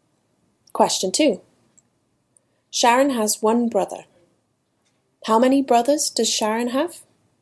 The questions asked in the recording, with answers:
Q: How many brothers does Sharon have?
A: She has one brother.